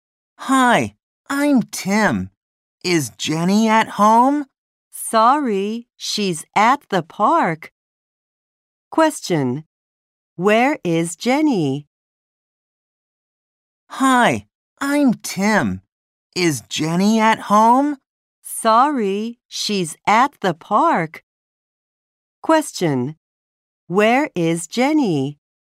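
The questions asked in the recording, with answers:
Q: Where is Jenny?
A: At the park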